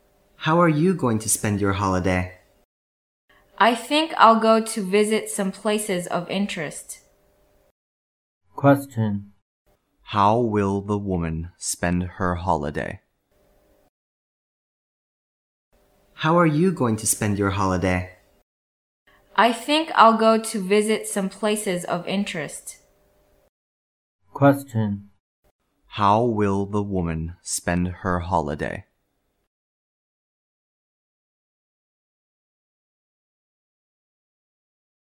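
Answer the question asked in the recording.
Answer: By visiting some places of interest.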